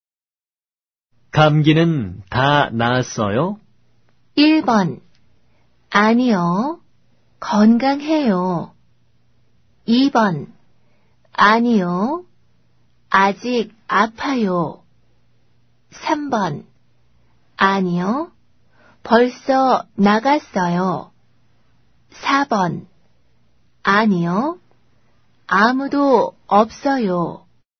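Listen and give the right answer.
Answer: 2: 아니요. 아직 아파요.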